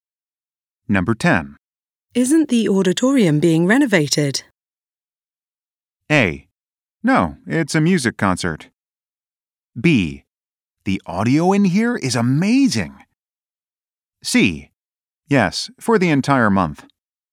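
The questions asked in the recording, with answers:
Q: Isn't the auditorium being renovated?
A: C: Yes, for the entire month.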